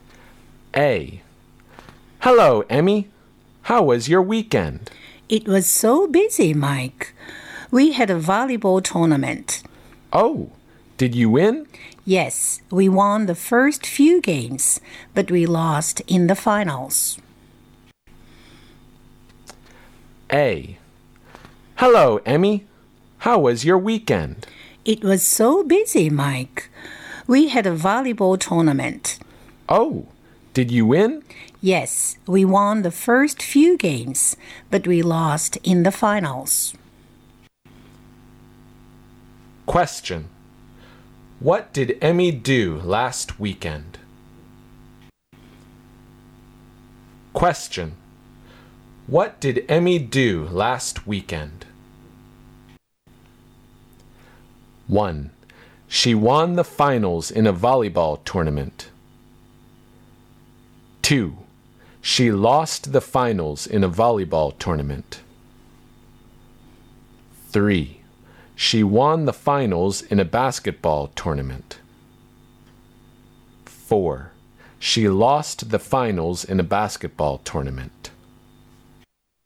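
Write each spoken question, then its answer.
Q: Question. What did Emmy do last weekend?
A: 2: She lost the finals in a volleyball tournament.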